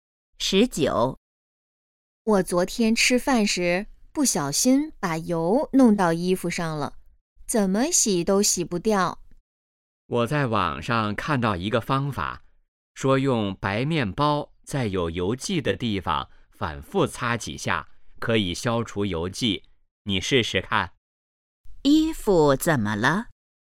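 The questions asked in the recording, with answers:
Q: 衣服怎么了?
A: 沾上了油迹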